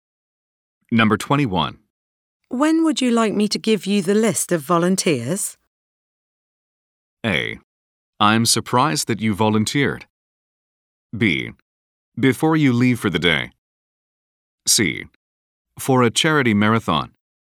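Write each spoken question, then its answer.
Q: When would you like me to give you the list of volunteers?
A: B: Before you leave for the day.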